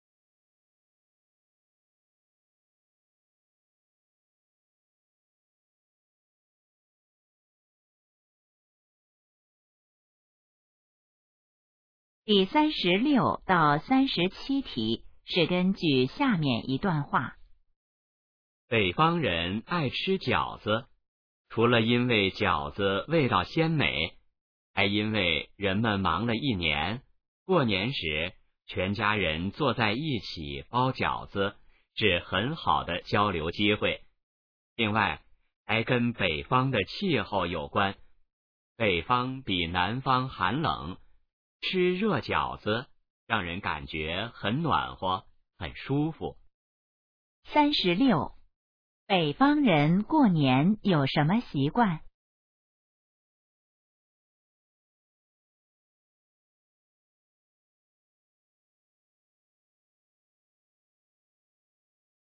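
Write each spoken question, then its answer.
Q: 北方人过年有什么习惯?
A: 全家一起包饺子、吃饺子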